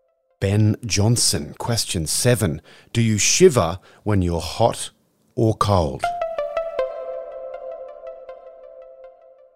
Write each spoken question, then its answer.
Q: Do you shiver when you're hot or cold?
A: You shiver when you're cold.